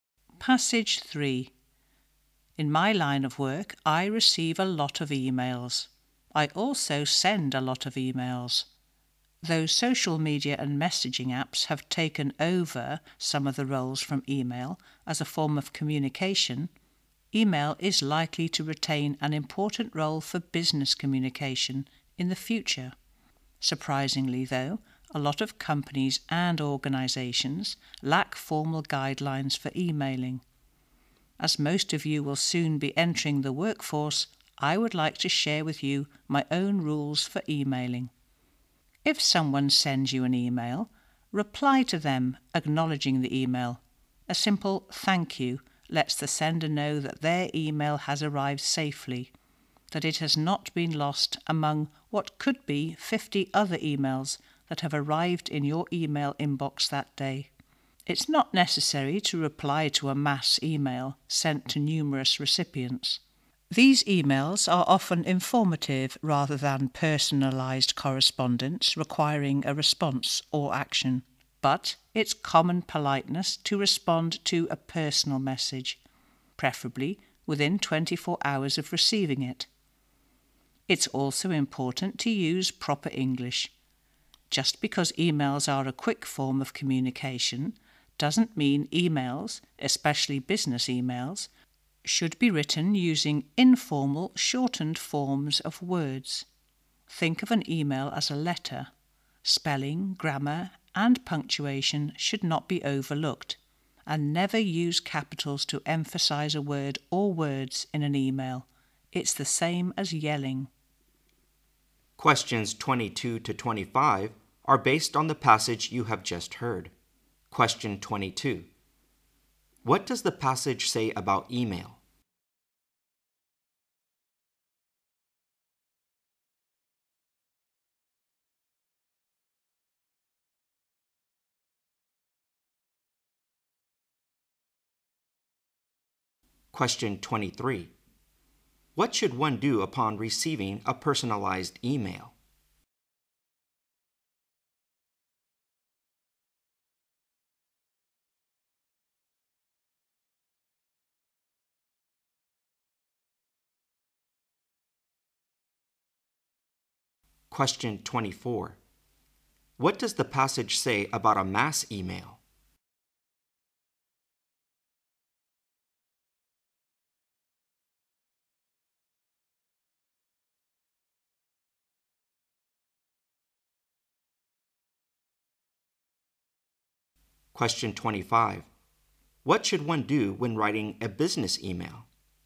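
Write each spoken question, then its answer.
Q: What does the passage say about email?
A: It will probably keep an important role in business communication.

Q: What should one do upon receiving a personalized email?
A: Reply to acknowledge it, preferably within 24 hours.

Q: What does the passage say about a mass email?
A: It is not necessary to reply to it.

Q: What should one do when writing a business email?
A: Use proper English, with correct spelling, grammar and punctuation.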